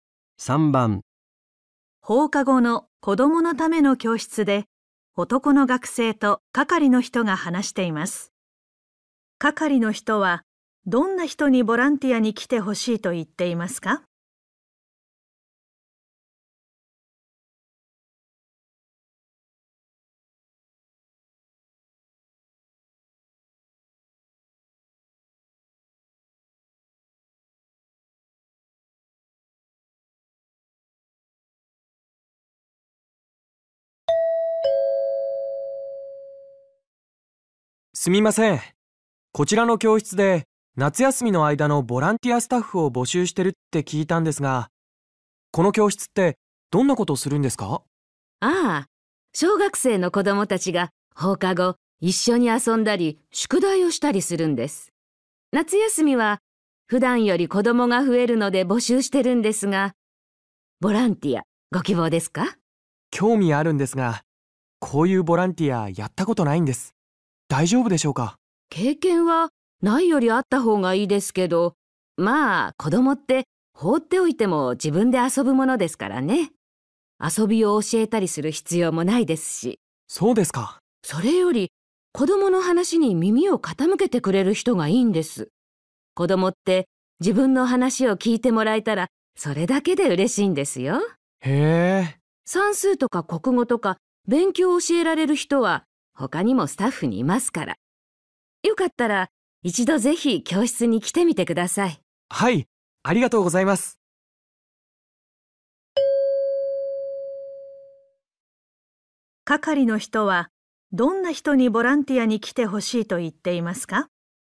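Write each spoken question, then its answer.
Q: 係の人はどんな人にボランティアに来てほしいと言っていますか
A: 子供の話に耳を傾けてくれる人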